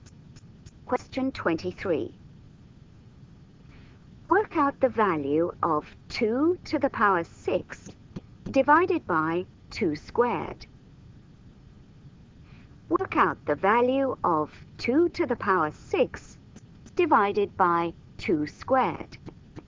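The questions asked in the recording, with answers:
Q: Work out the value of 2 to the power 6 divided by 2 squared.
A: 16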